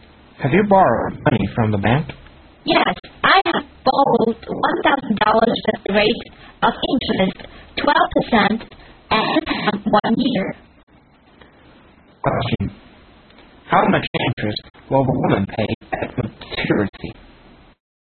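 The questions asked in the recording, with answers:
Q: How much interest will the woman pay at maturity?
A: $120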